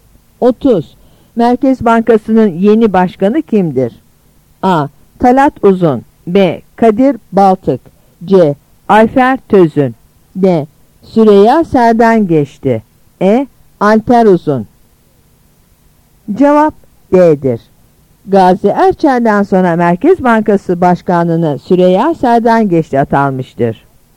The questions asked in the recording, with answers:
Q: Merkez Bankası'nın yeni başkanı kimdir?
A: Cevap D'dir.